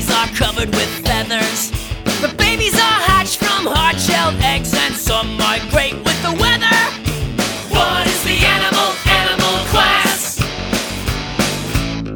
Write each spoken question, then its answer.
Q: What is the animal? Animal class?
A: Birds!